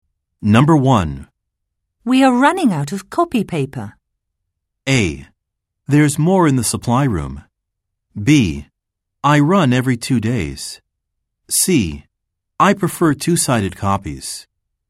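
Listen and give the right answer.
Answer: A: There's more in the supply room.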